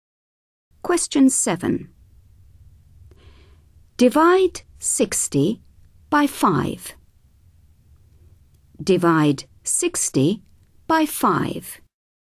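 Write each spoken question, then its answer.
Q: Divide 60 by 5.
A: 12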